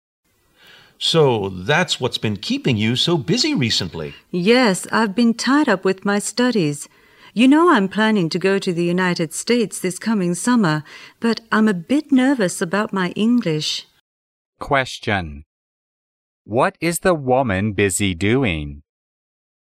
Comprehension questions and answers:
What is the woman busy doing?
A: Brushing up on her English.

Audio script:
M: So, that's what's been keeping you so busy recently!
W: Yes, I've been tied up with my studies. You know I'm planning to go to the United States this coming summer, but I'm a bit nervous about my English.
Question: What is the woman busy doing?